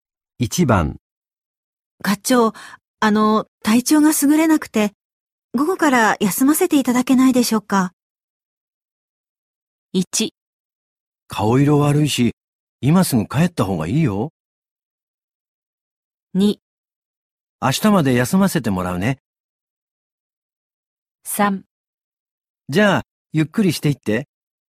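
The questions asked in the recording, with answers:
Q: 体調が優れなくて、午後から休ませていただけないでしょうか。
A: 1: 顔色悪いし、今すぐ帰った方がいいよ。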